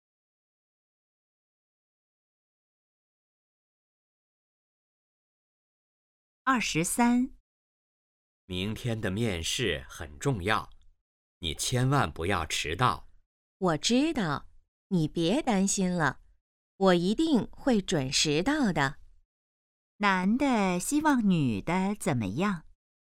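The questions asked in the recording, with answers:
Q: 男的希望女的怎么样?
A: 面试别迟到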